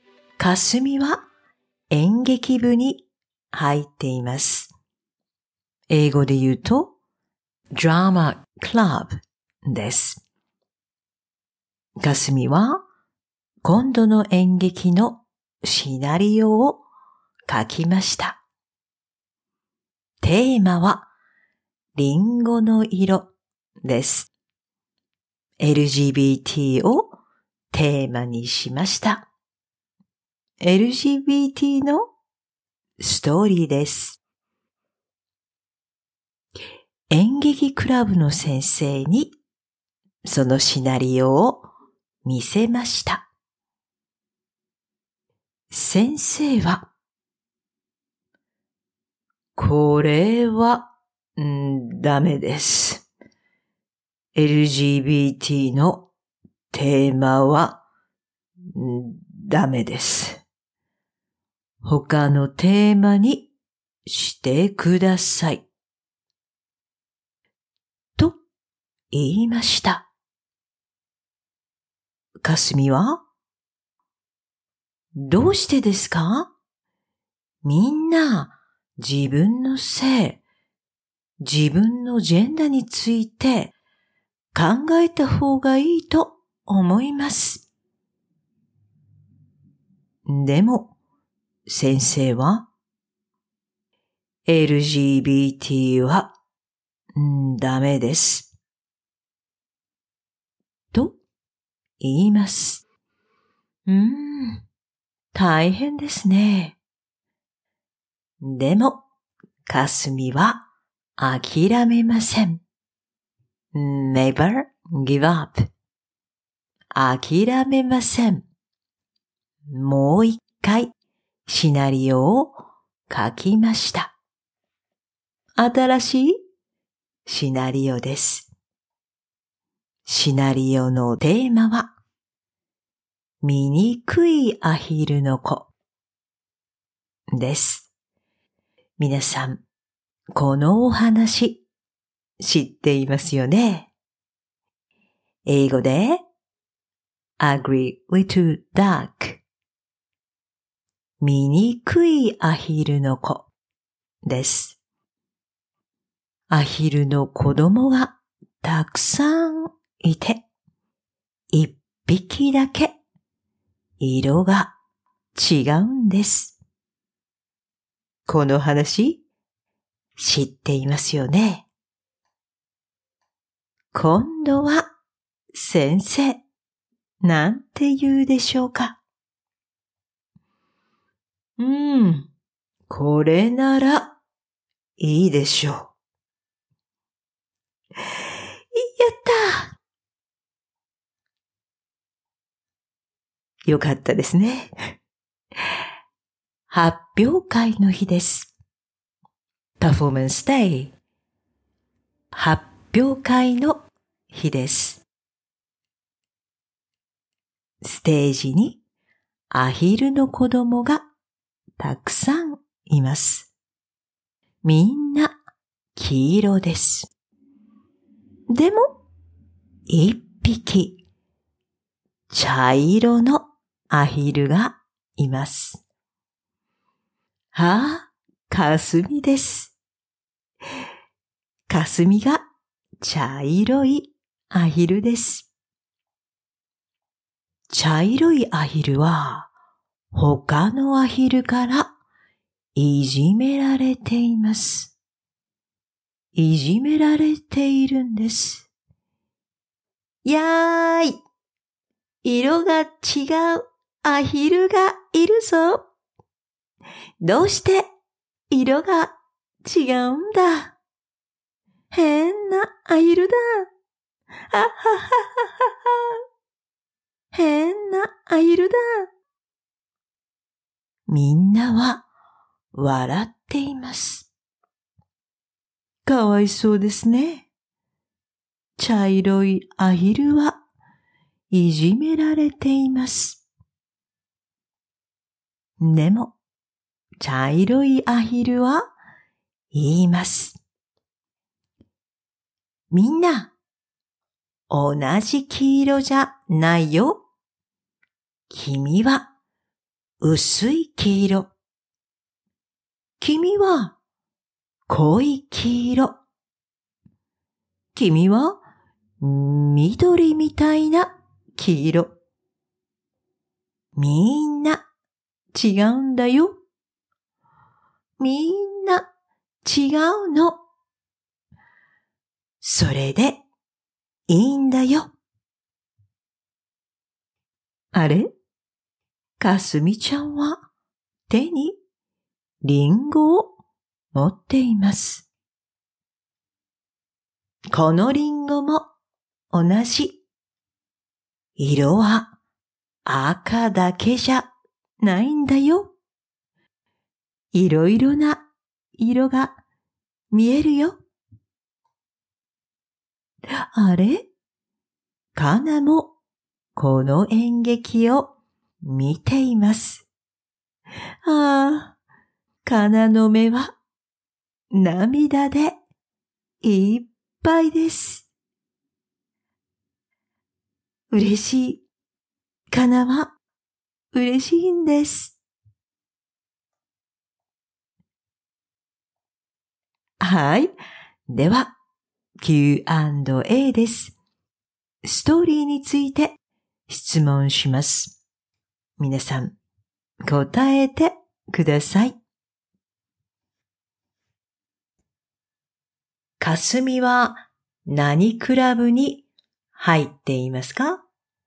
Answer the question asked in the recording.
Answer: 演劇クラブです。演劇クラブに入っています。